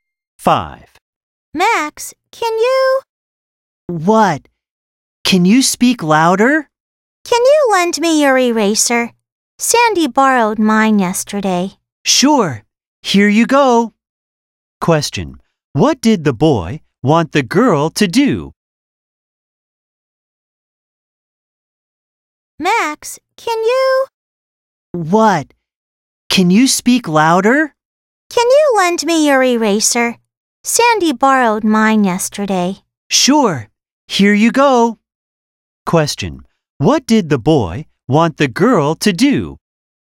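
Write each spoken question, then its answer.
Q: What did the boy want the girl to do?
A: Lend him her eraser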